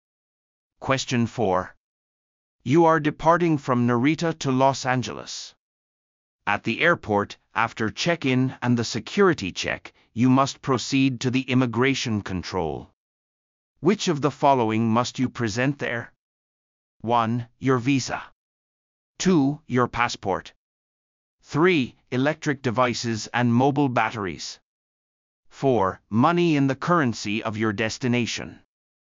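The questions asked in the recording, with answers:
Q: Which of the following must you present there?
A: 2: Your passport.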